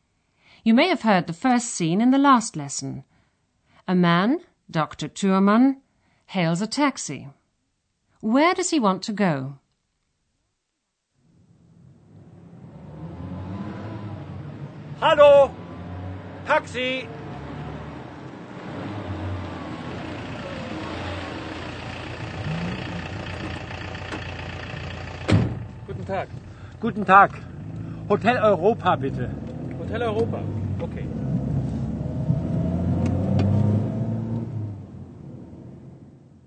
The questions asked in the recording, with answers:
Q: Where does he want to go?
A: Dr. Thürmann asks the taxi driver to take him to a hotel, the Hotel Europa.